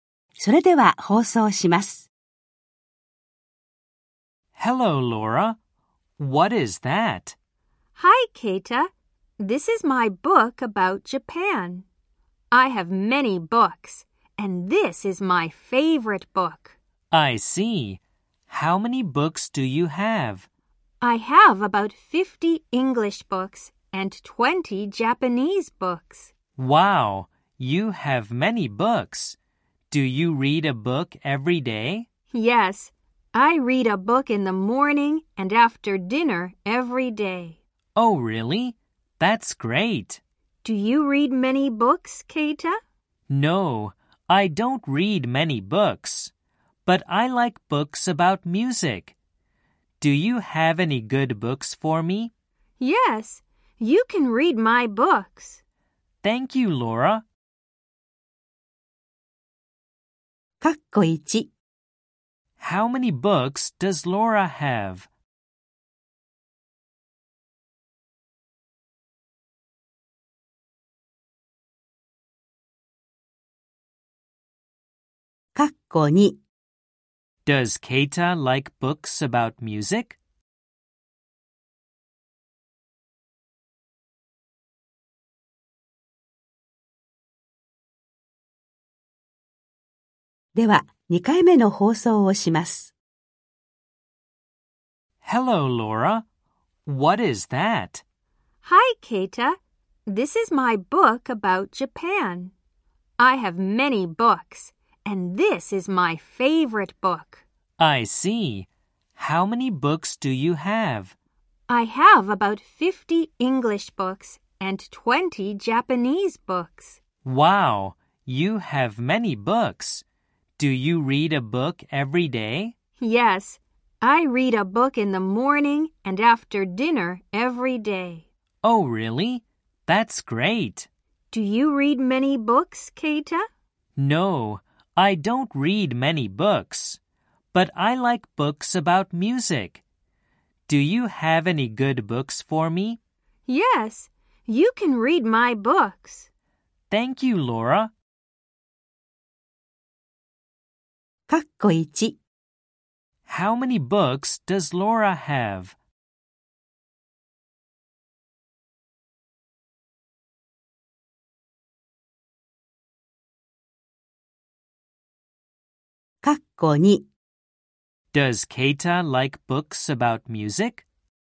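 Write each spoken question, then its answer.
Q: How many books does Laura have?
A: About 70 books (50 English and 20 Japanese).

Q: Does Keita like books about music?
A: Yes, he does.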